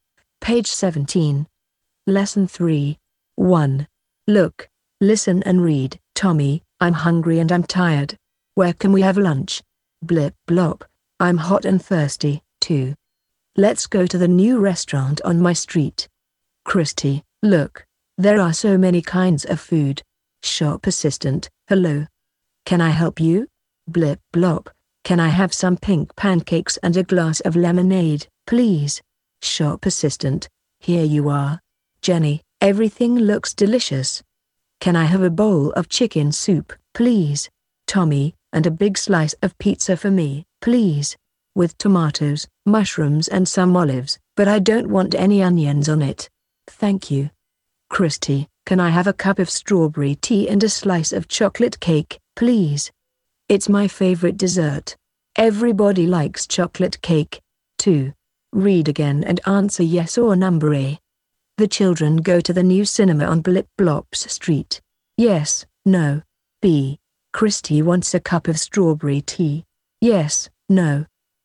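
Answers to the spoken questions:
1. No
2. Yes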